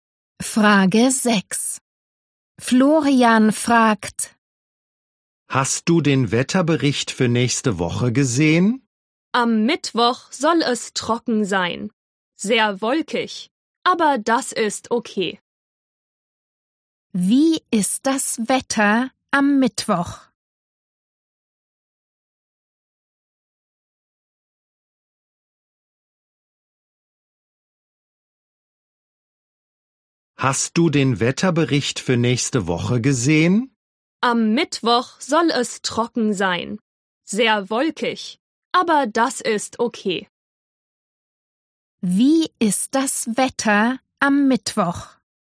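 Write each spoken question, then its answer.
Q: Wie ist das Wetter am Mittwoch?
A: Trocken, aber sehr wolkig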